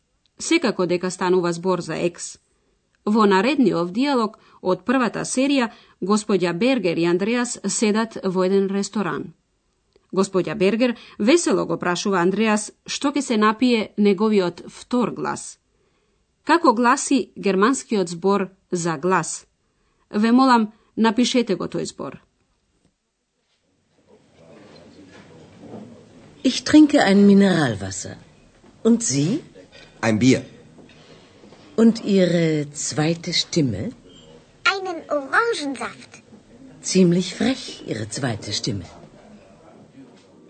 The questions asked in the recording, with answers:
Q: Како гласи германскиот збор за глас?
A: Тој гласи штиме.